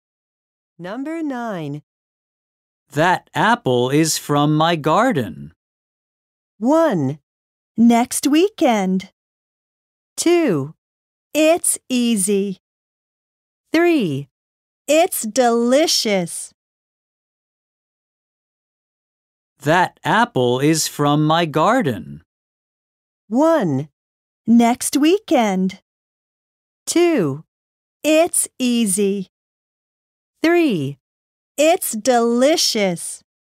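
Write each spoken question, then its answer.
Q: That apple is from my garden.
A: 3: It's delicious.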